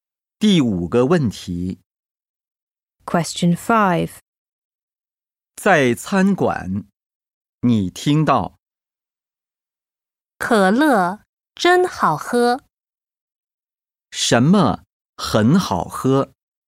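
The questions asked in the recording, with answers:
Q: 什么很好喝?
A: 可乐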